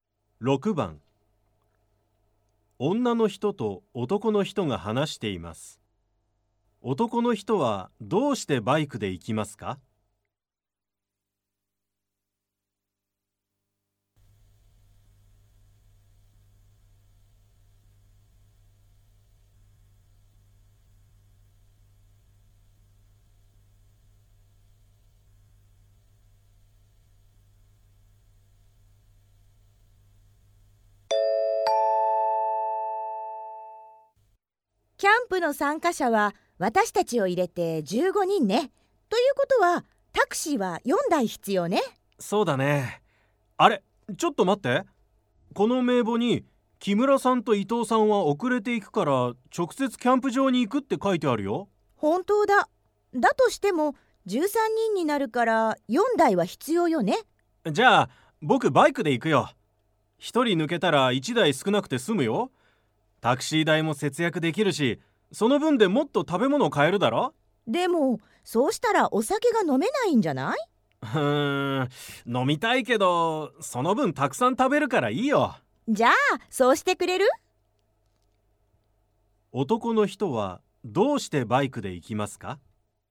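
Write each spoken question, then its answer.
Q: 男の人はどうしてバイクで行きますか?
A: 1人抜ければタクシーが1台少なくて済み、タクシー代を節約できるから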